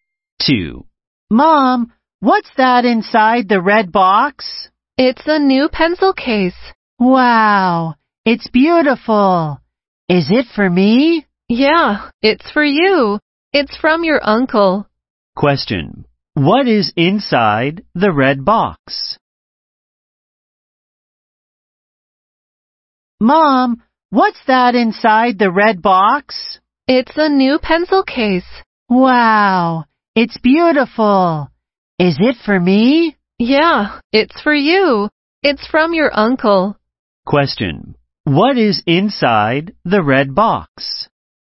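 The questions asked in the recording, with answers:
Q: What is inside the red box?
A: A new pencil case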